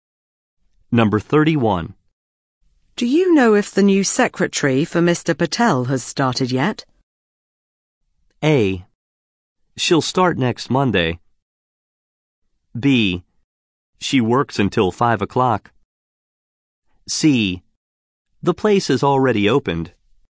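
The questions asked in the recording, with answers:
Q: Do you know if the new secretary for Mr.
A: A: She'll start next Monday.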